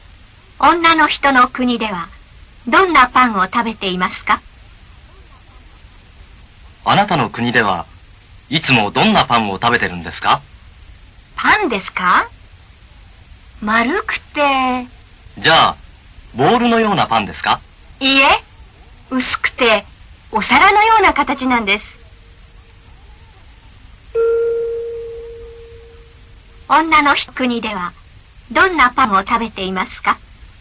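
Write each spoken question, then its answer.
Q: 女の国ではどんなパンを食べていますか?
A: 丸くて薄い、お皿のような形のパン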